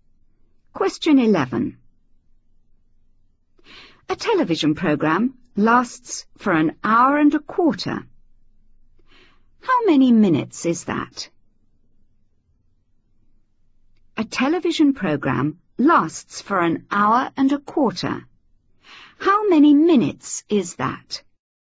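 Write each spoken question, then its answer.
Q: How many minutes is that?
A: 75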